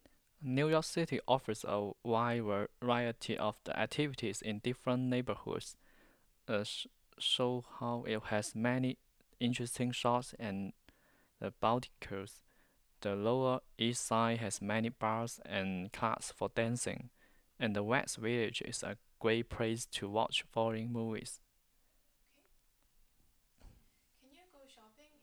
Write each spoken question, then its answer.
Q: Can you go shopping in Soho?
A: Yes, you can go shopping in Soho.